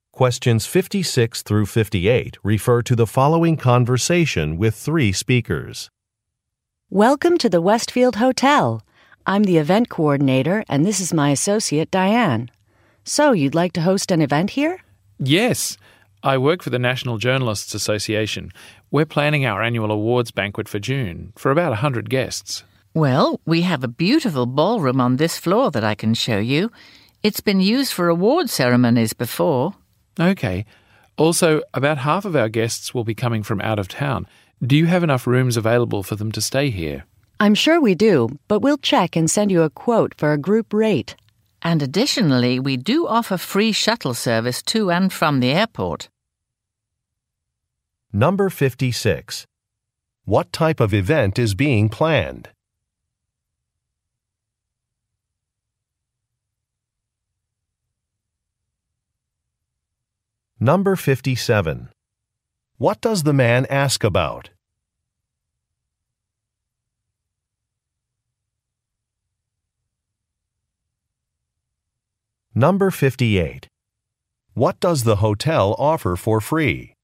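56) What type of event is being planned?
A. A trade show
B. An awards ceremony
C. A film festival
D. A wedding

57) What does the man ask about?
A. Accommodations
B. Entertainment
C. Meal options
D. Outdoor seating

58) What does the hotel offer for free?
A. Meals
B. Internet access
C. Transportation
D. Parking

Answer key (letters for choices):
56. B
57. A
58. C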